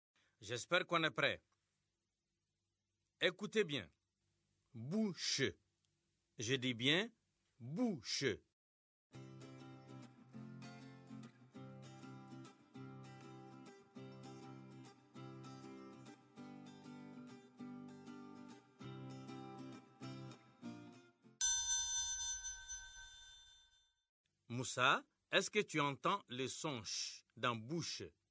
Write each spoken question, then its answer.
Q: Moussa, est-ce que tu entends le son ch dans bouche?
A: Oui, monsieur. Dans bouche, il y a le son ch.